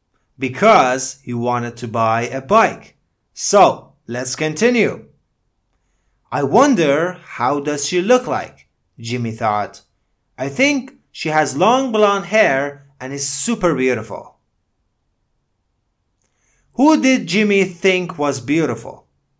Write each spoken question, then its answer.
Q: Who did Jimmy think was beautiful?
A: Jimmy thought the girl was beautiful.